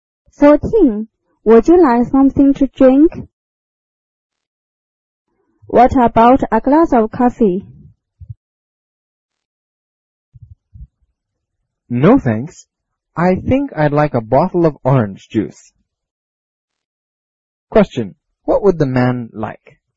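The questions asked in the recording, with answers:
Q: What would the man like?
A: A bottle of orange juice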